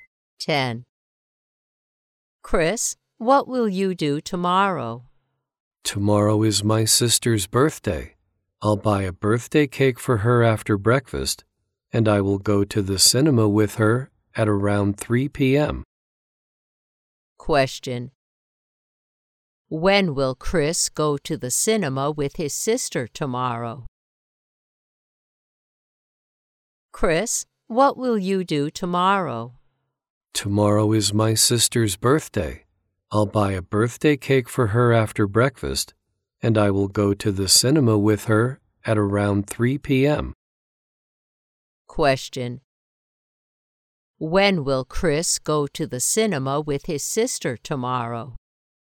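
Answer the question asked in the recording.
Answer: At around 3 p.m.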